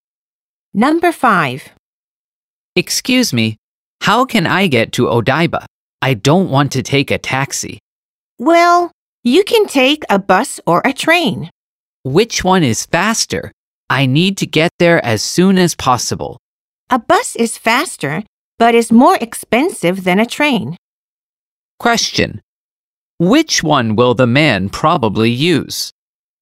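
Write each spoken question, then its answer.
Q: Which one will the man probably use?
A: A bus.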